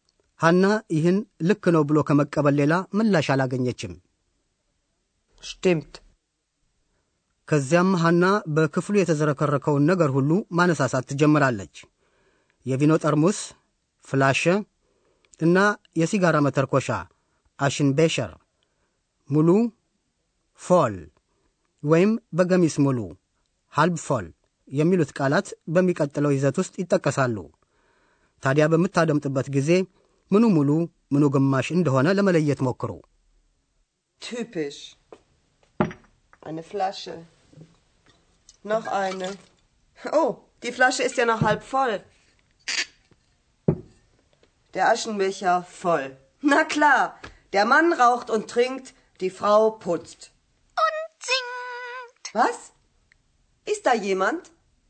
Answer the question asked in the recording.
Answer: የሲጋራ መተርኮሻው ሙሉና የጠርሙሱ ቪኖ ደግሞ ግማሽ ነው።